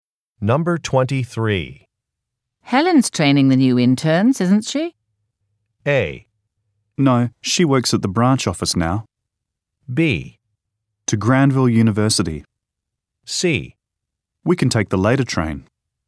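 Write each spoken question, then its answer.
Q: Helen's training the new interns, isn't she?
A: A: No, she works at the branch office now.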